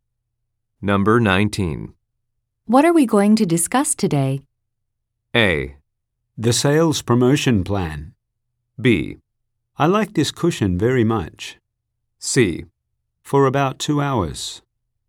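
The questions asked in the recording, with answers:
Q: What are we going to discuss today?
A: A: The sales promotion plan.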